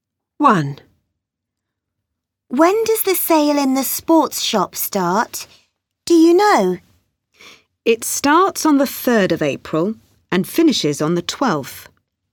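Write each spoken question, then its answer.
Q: When does the sale in the sports shop start?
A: On the 3rd of April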